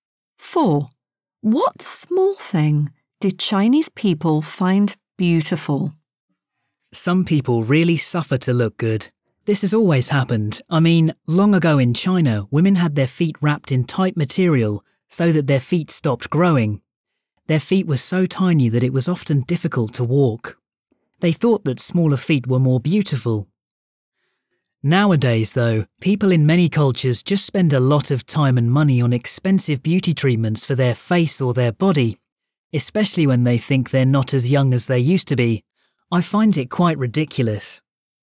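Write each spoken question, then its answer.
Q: What small thing did Chinese people find beautiful?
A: small feet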